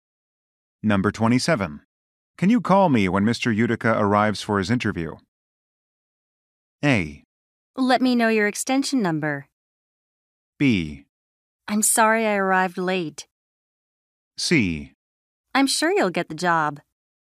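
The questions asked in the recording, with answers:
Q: Can you call me when Mr.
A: A: Let me know your extension number.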